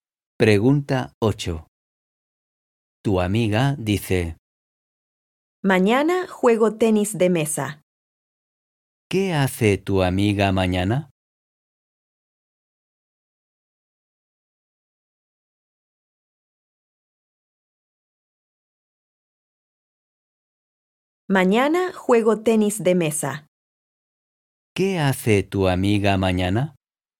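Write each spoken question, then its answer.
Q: ¿Qué hace tu amiga mañana?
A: Juega al tenis de mesa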